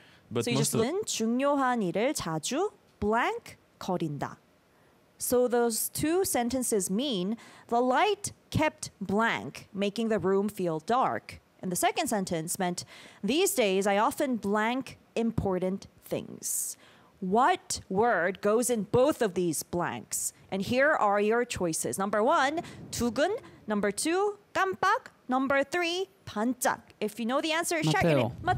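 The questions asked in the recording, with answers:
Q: What word goes in both of these blanks?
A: 2: 깜빡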